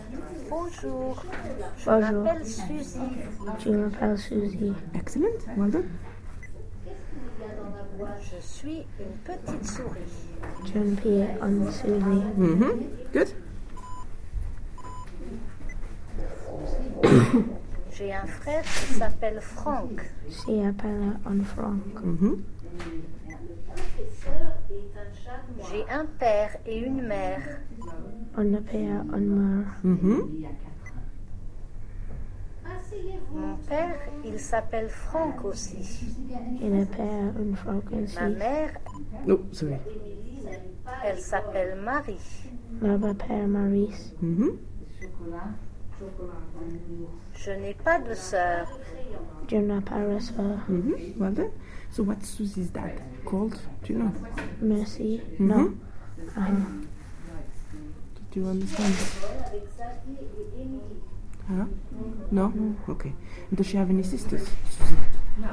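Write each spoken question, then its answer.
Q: So what's Susie's dad called?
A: Franck

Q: And does she have any sisters?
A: No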